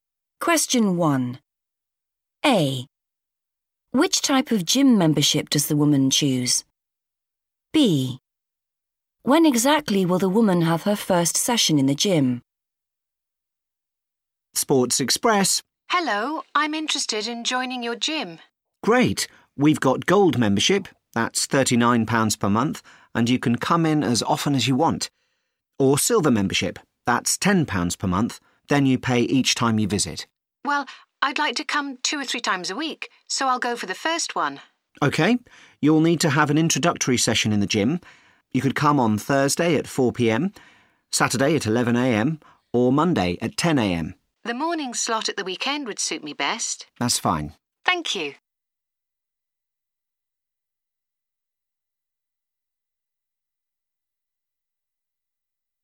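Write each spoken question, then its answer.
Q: Which type of gym membership does the woman choose?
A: gold membership

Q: When exactly will the woman have her first session in the gym?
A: Saturday at 11am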